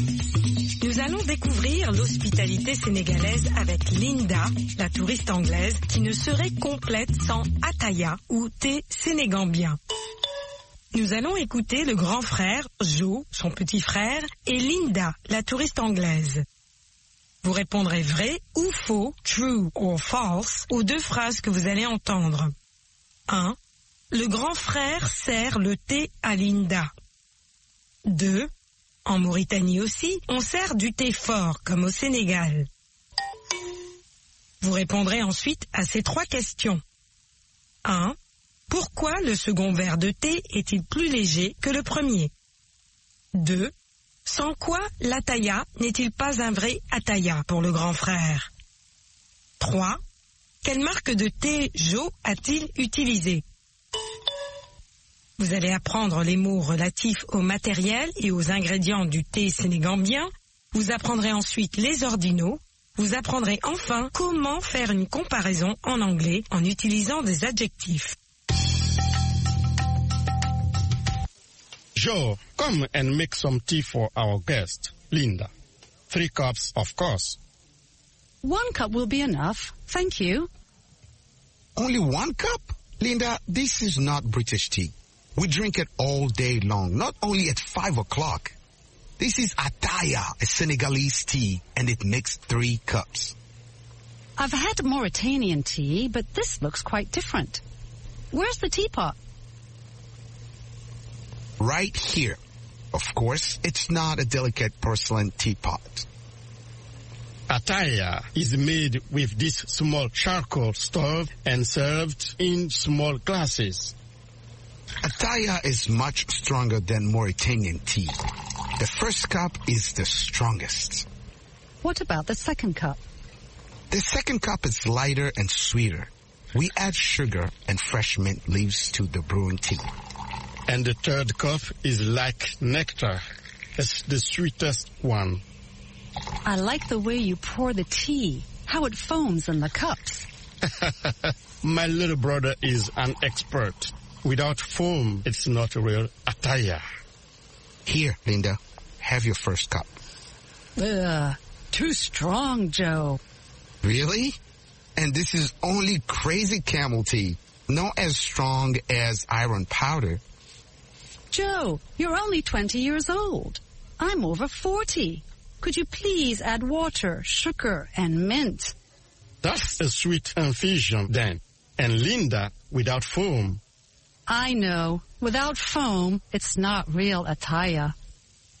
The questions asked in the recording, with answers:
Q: Le grand frère sert le thé à Linda.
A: L'énoncé 1 est faux.

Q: En Mauritanie aussi, on sert du thé fort, comme au Sénégal.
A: L'énoncé 2 est faux.

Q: Pourquoi le second verre de thé est-il plus léger que le premier?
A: Il est plus sucré et parfumé aux feuilles de menthe fraîches.

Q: Sans quoi l'Ataya n'est-il pas un vrai Ataya pour le grand frère?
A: Sans la mousse.

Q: Quelle marque de thé Jo a-t-il utilisé?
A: Crazy Camel.